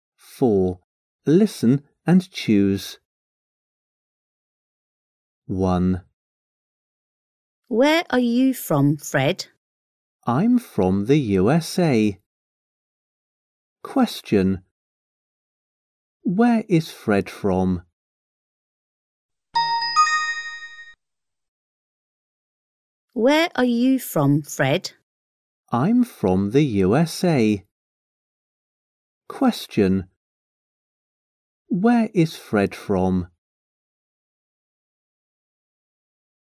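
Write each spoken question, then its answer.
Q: Where is Fred from?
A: the USA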